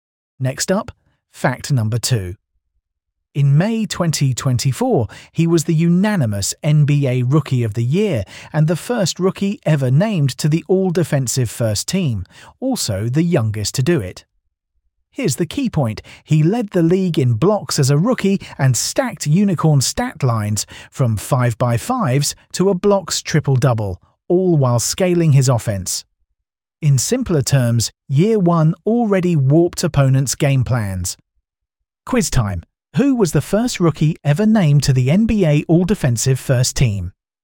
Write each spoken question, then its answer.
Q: Who was the first rookie ever named to the NBA All-Defensive First Team?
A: Correct answer, Victor Wembanyama.